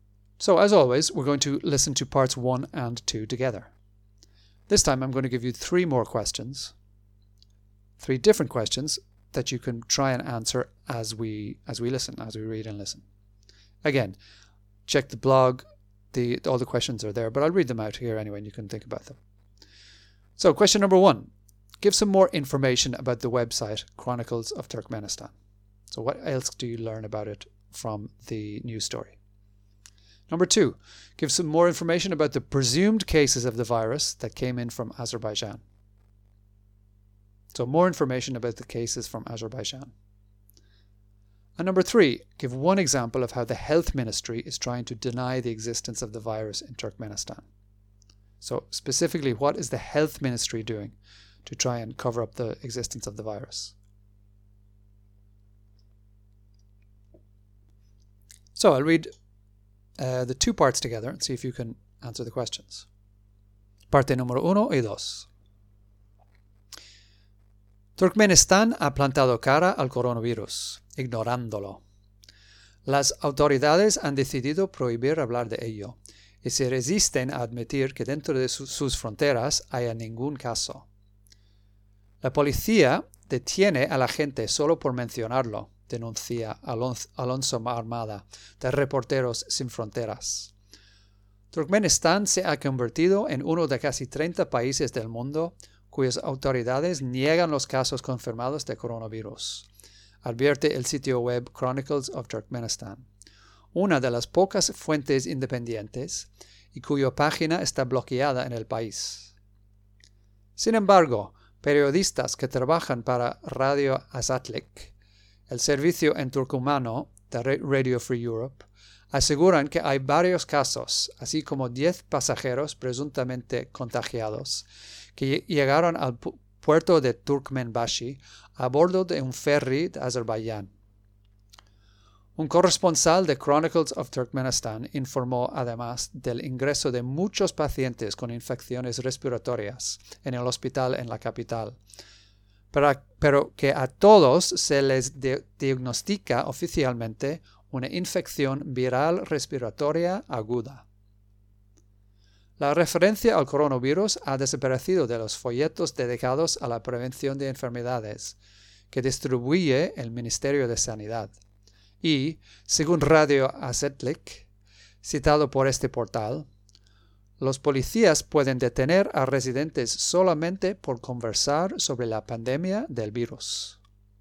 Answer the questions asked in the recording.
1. One of the few independent sources.
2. So 10 passengers, they came to the port on a ferry.
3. So the leaflets dedicated to the prevention of illness um, had the, all references to the coronavirus taken out.